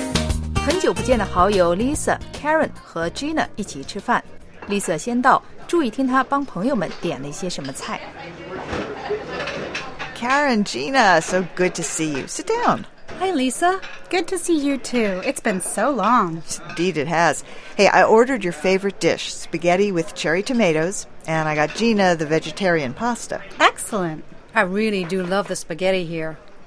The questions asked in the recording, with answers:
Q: 注意听她帮朋友们点了一些什么菜。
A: Lisa 最早一个到,已经帮 Karen 和 Gina 点好了他们最爱吃的菜。